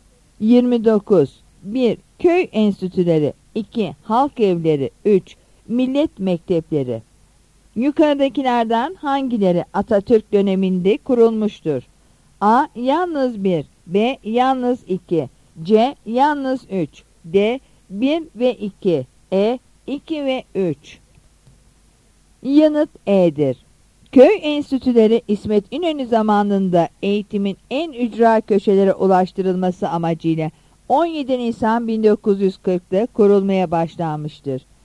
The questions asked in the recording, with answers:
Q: Yukarıdakilerden hangileri Atatürk döneminde kurulmuştur?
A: Yanıt E'dir.